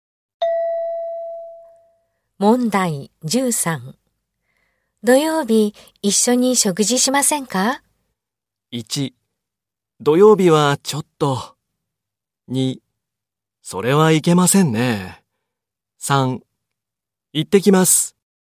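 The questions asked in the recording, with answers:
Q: 土曜日一緒に食事しませんか?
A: 3: 土曜日はちょっと。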